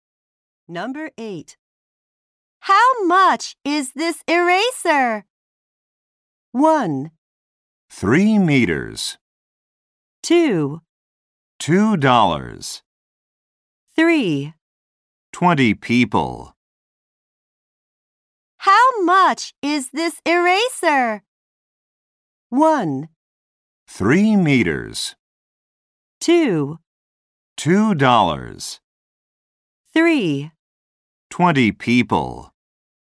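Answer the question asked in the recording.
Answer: 2: $2.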